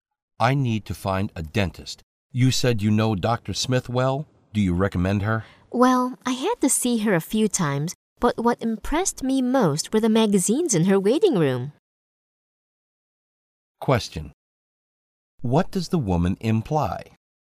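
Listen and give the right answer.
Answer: She doesn't recommend Dr. Smith; she wasn't impressed by her dental work.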